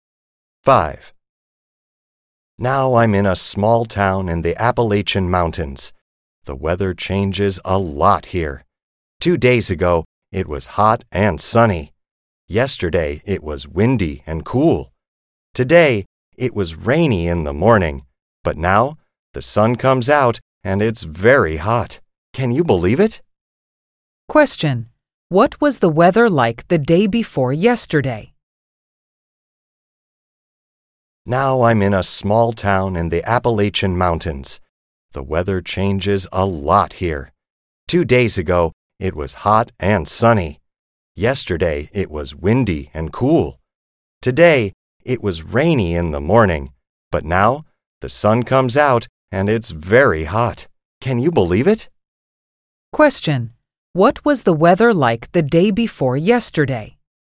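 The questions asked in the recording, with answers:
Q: Question: what was the weather like the day before yesterday?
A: Hot and sunny.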